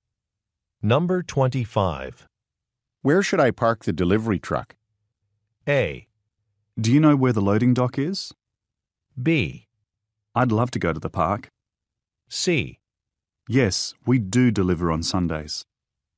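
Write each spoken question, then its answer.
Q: Where should I park the delivery truck?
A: A: Do you know where the loading dock is?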